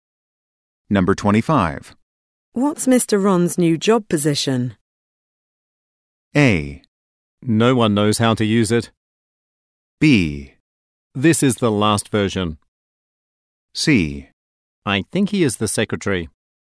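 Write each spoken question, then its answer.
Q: What's Mr. Ron's new job position?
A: C: I think he is the secretary.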